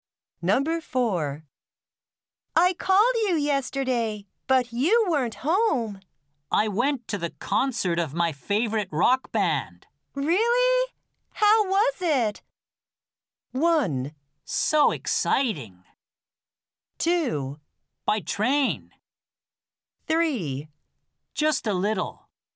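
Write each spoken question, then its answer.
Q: Really? How was it?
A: 1: So exciting.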